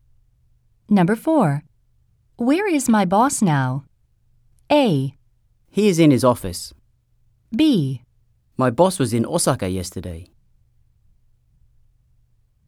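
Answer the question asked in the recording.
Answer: A: He is in his office.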